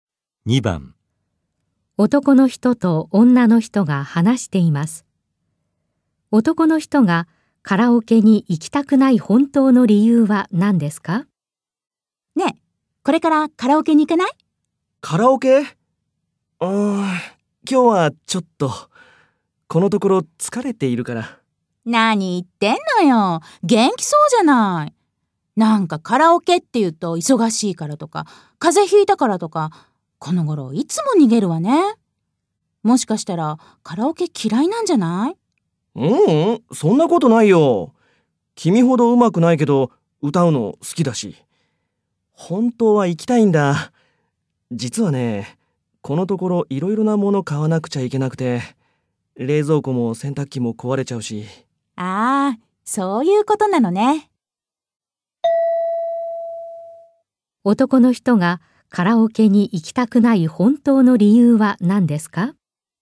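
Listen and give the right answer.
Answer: 冷蔵庫や洗濯機が壊れて色々買わなければならず、お金がないから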